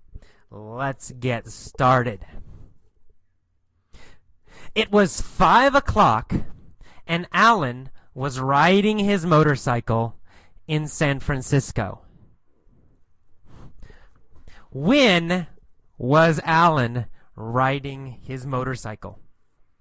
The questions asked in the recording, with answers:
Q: When was Alan riding his motorcycle?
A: Well, at 5 o'clock, right?